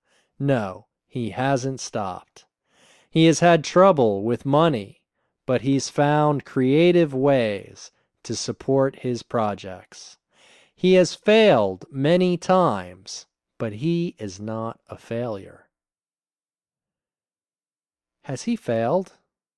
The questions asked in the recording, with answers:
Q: Has he failed?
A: Yes, he has failed many times.